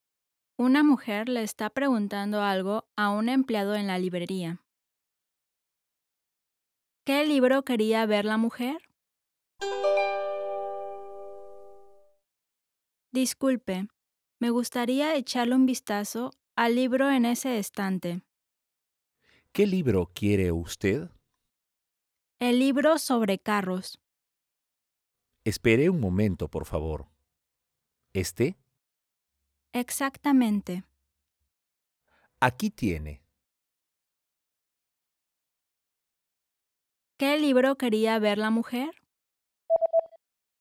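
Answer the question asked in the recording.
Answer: El libro sobre carros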